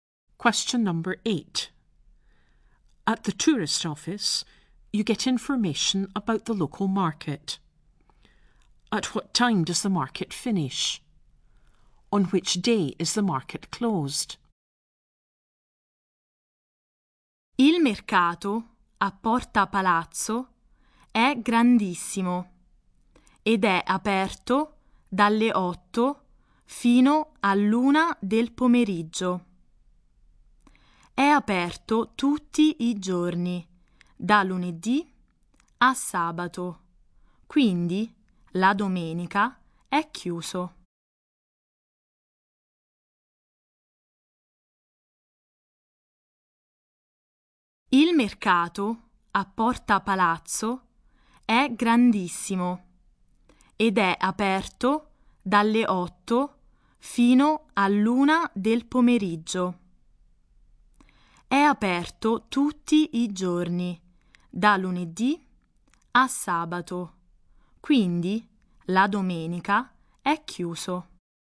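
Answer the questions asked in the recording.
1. 1 pm
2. Sunday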